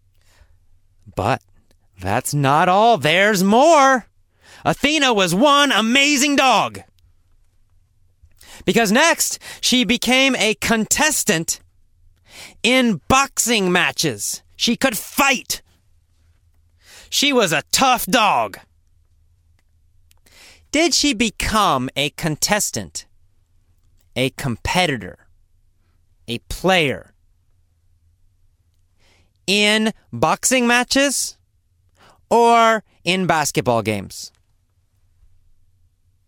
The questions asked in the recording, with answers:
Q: Did she become a contestant, a competitor, a player in boxing matches or in basketball games?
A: Well, in boxing matches. She became a contestant in boxing matches.